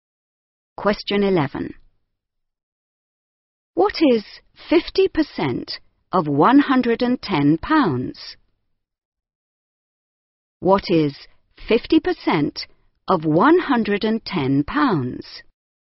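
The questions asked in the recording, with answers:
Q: What is 50% of £110?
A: £55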